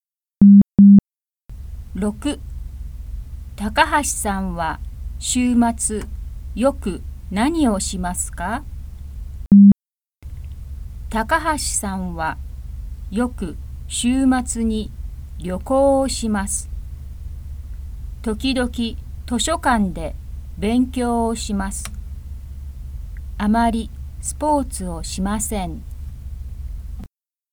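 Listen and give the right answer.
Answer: 旅行をします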